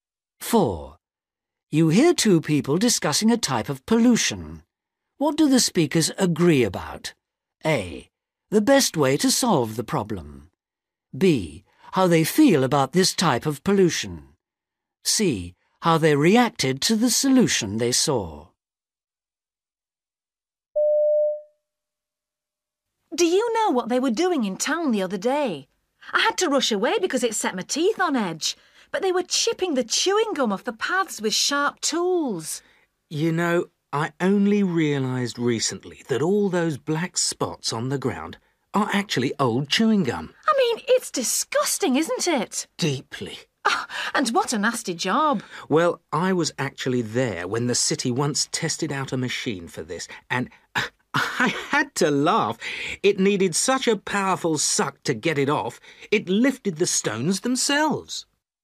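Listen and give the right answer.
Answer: B: How they feel about this type of pollution.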